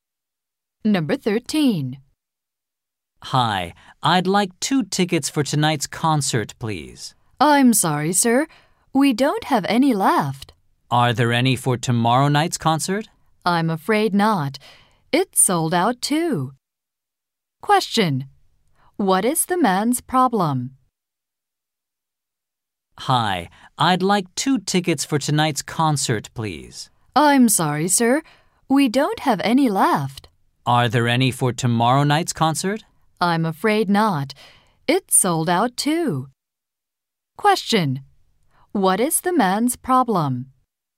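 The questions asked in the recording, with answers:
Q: Question. What is the man's problem?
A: He can't get concert tickets; they are sold out.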